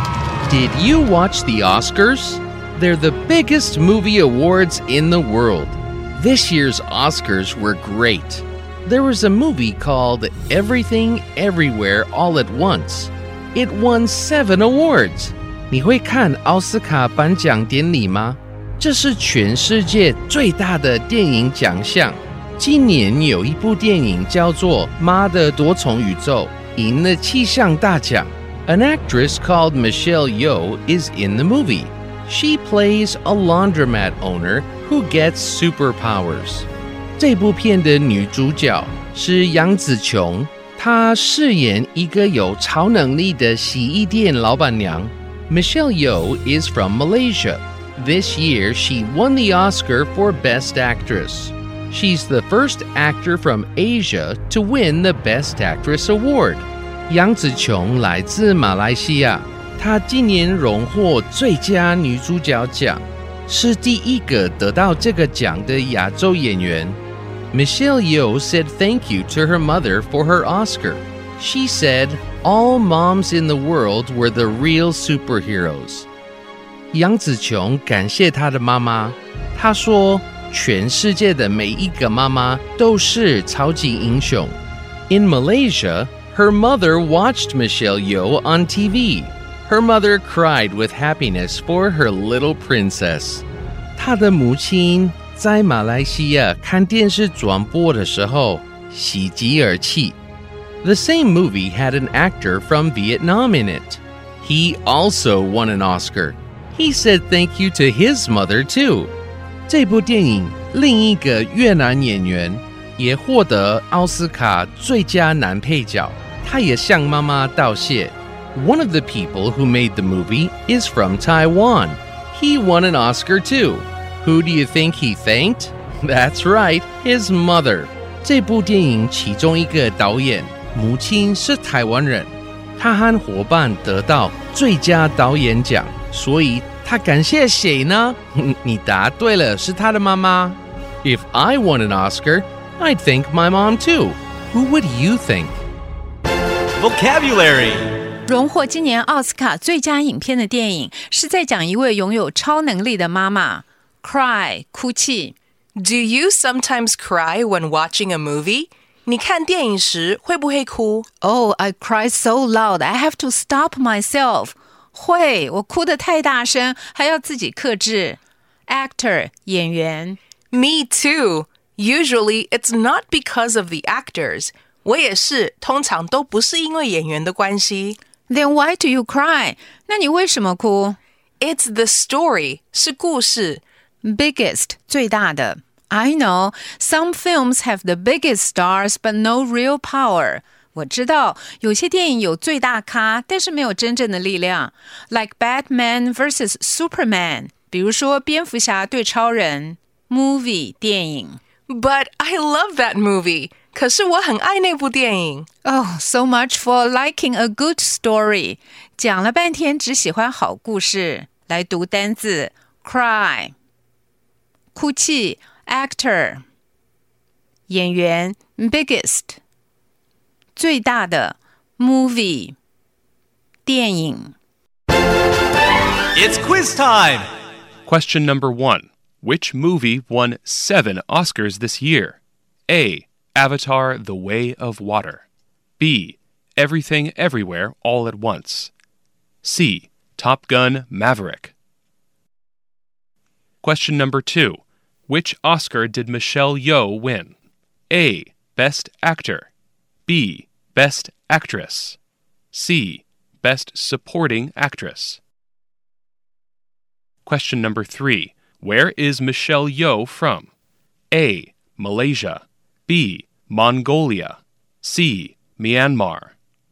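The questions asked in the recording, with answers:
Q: Which movie won 7 Oscars this year?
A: B: Everything Everywhere All at Once

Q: Which Oscar did Michelle Yeoh win?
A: B: Best Actress

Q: Where is Michelle Yeoh from?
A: A: Malaysia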